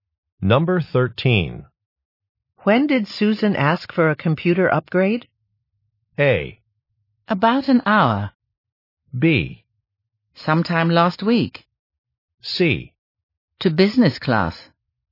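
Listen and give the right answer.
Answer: B: Sometime last week.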